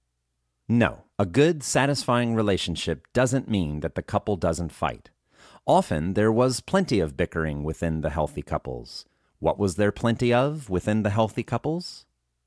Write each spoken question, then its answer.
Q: What was there plenty of within the healthy couples?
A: There was plenty of bickering within the healthy couples, but they knew they would be there for each other.